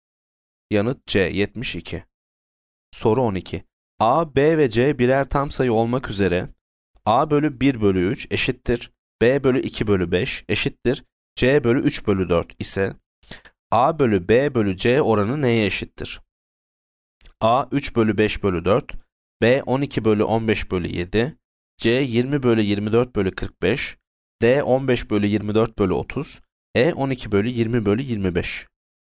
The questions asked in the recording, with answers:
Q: A, B ve C birer tam sayı olmak üzere A bölü 1 bölü 3 eşittir B bölü 2 bölü 5 eşittir C bölü 3 bölü 4 ise A bölü B bölü C oranı neye eşittir?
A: Yanıt C 20 bölü 24 bölü 45.